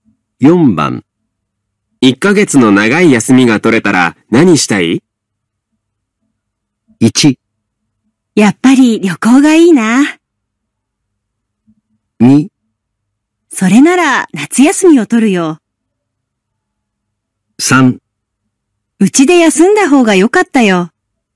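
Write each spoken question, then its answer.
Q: 1ヶ月の長い休みが取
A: 1: やっぱり旅行がいいな。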